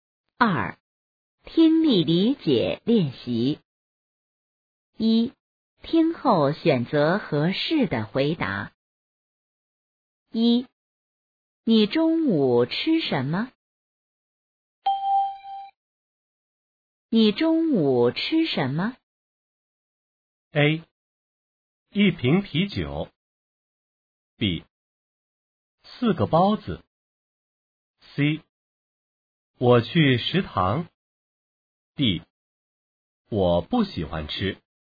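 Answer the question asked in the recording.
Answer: B: 四个包子。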